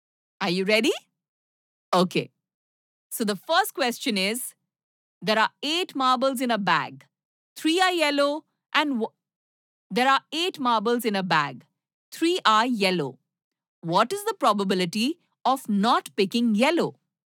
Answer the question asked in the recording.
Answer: Yes, 5/8.